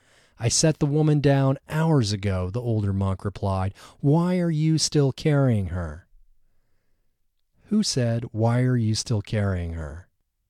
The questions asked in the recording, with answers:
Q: Who said, why are you still carrying her?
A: The older monk said, why are you still carrying her?